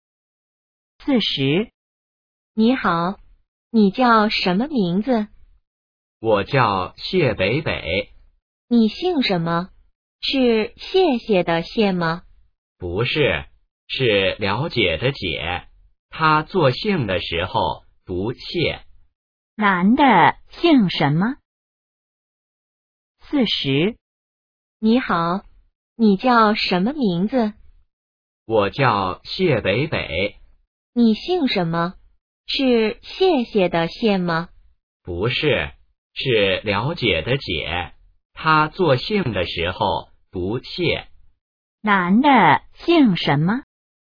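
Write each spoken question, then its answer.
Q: 男的姓什么?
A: 解(了解的解,读作谢)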